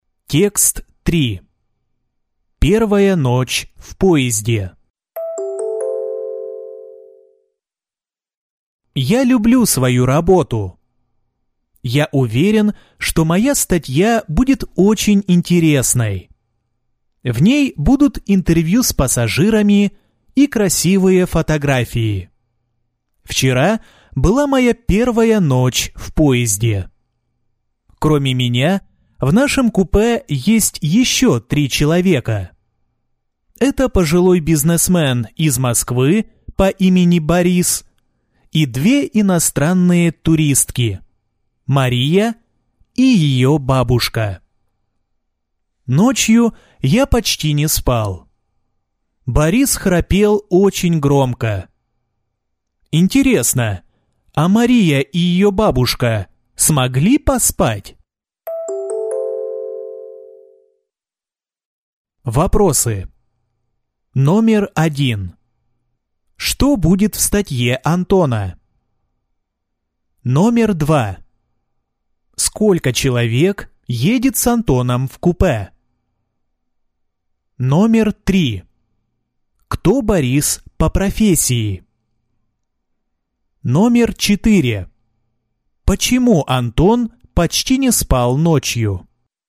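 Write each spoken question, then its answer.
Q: Что будет в статье Антона?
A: Интервью с пассажирами и красивые фотографии

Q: Сколько человек едет с Антоном в купе?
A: 3 человека

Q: Кто Борис по профессии?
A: Бизнесмен

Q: Почему Антон почти не спал ночью?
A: Борис очень громко храпел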